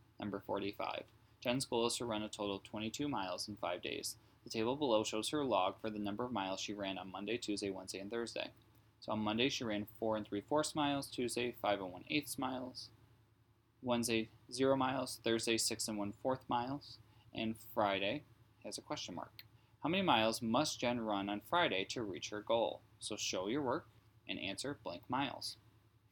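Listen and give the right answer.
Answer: 5 7/8 miles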